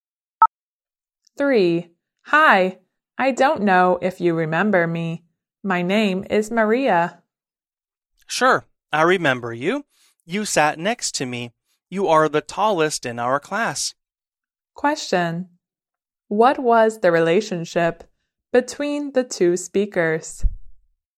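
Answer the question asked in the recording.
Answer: Classmates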